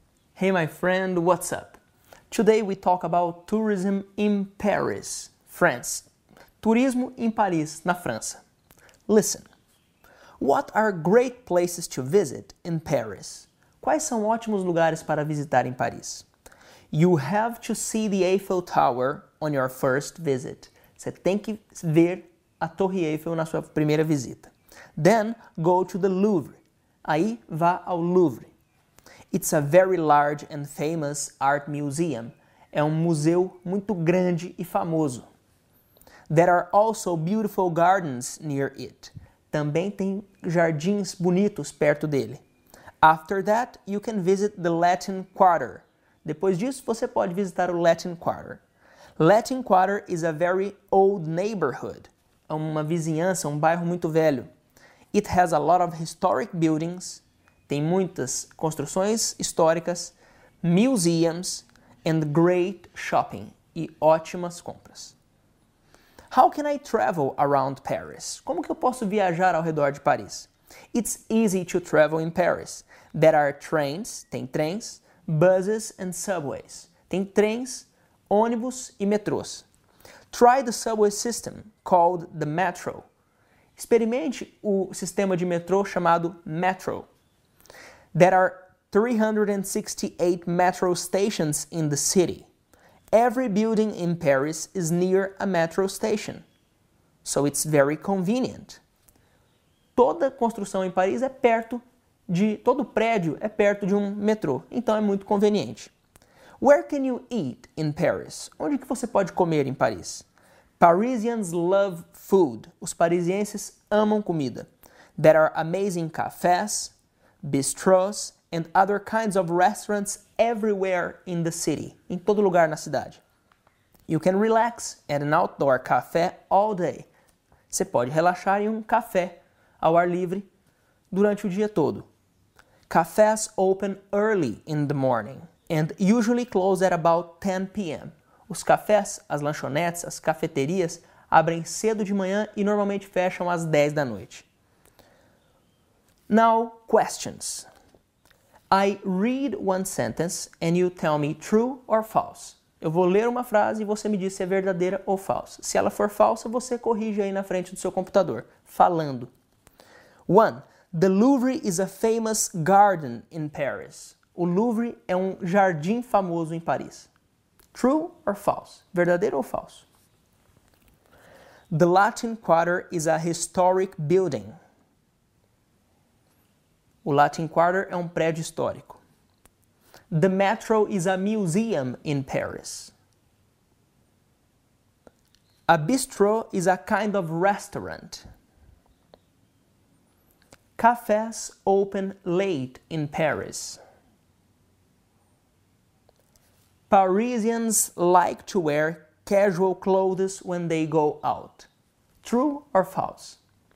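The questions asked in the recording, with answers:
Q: The Louvre is a famous garden in Paris.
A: False: it is a famous art museum

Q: The Latin Quarter is a historic building.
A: False: it is an old neighborhood

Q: The metro is a museum in Paris.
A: False: it is the subway system

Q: A bistro is a kind of restaurant.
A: True

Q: Cafes open late in Paris.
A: False: they open early in the morning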